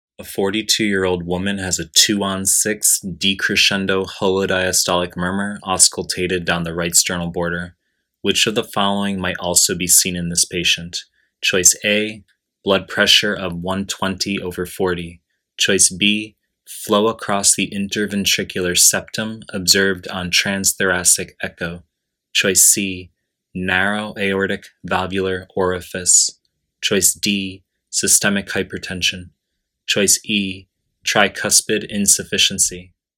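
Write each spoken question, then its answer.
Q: Which of the following might also be seen in this patient?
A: A: blood pressure of 120 over 40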